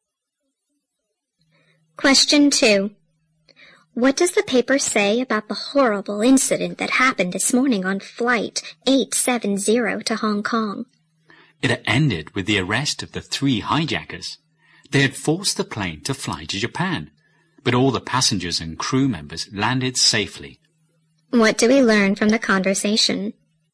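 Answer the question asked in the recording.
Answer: The hijackers were arrested and everyone on the plane landed safely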